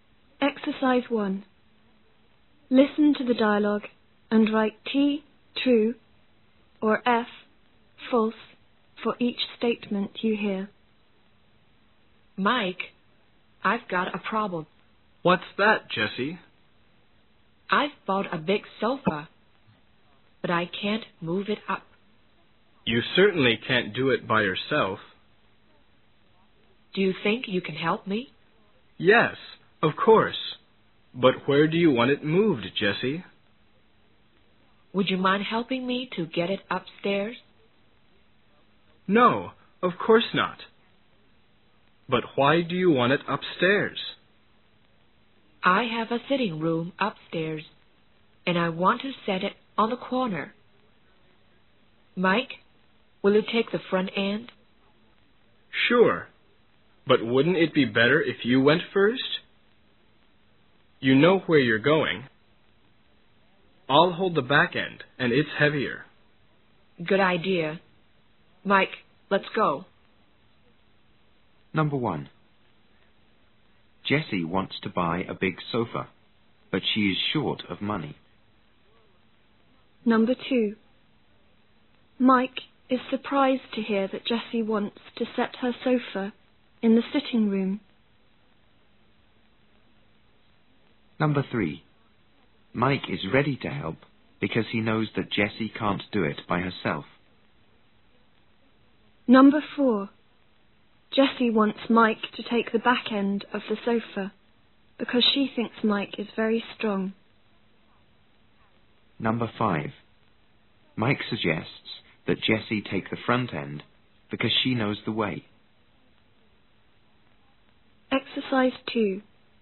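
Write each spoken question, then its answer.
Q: Jessie wants to buy a big sofa, but she is short of money.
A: False

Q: Mike is ready to help because he knows that Jessie can't do it by herself.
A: True

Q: Jessie wants Mike to take the back end of the sofa because she thinks Mike is very strong.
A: False

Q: Mike suggests that Jessie take the front end because she knows the way.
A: True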